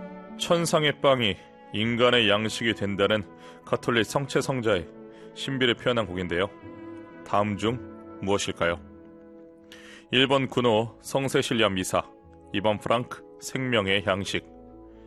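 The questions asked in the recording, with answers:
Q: 다음 중 무엇일까요? 1번 군호 성세실리아 미사, 2번 프랑크 생명의 양식.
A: 2: 프랑크 생명의 양식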